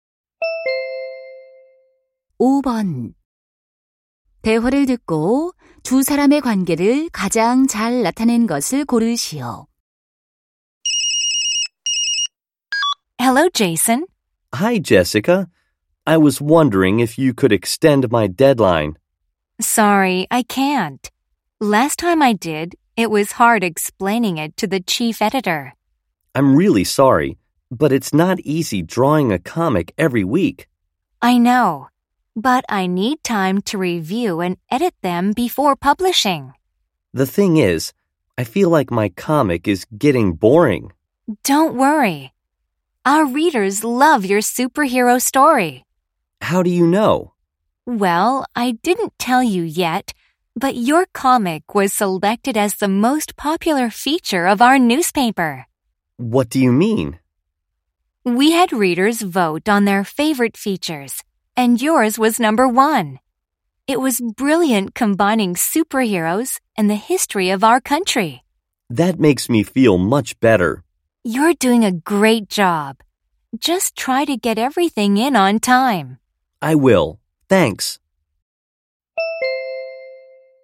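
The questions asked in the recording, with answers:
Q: 대화를 듣고 두 사람의 관계를 가장 잘 나타낸 것을 고르시오.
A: 신문 편집자 - 만화가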